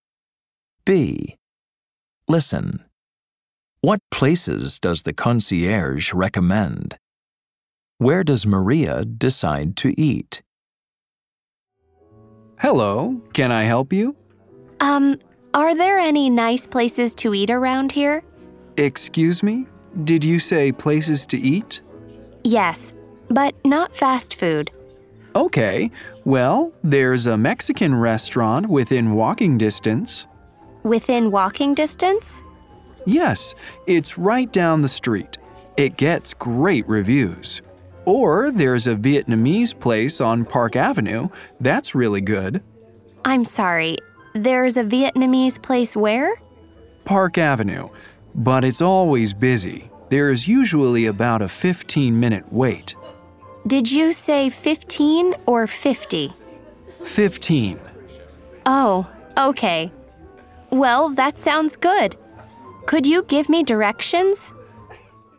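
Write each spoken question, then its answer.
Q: What places does the concierge recommend?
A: A Mexican restaurant within walking distance and a Vietnamese place on Park Avenue

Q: Where does Maria decide to eat?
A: The Vietnamese place on Park Avenue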